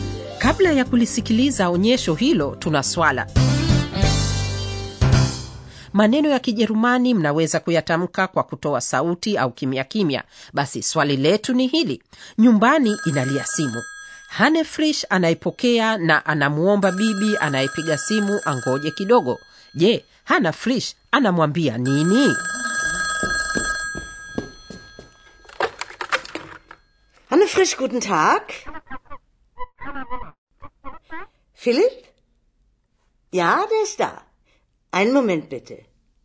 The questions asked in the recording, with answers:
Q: je hana frish anamwambia nini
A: Hane Frisch anamwambia bibi anayempigia simu, angojea kidogo tafadhali, einen Moment bitte.